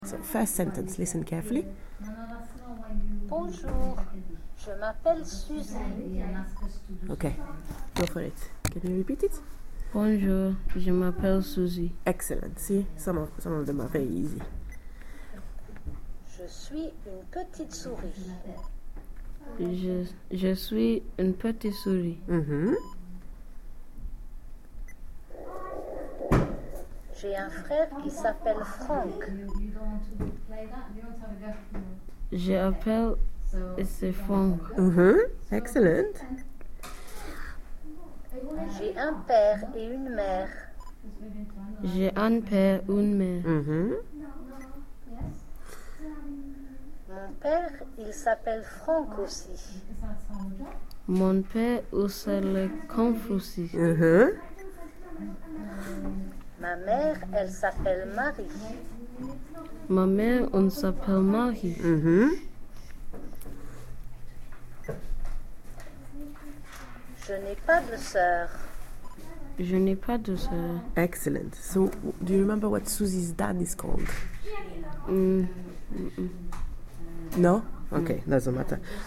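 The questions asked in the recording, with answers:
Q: So, do you remember what Susie's dad is called?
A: Franck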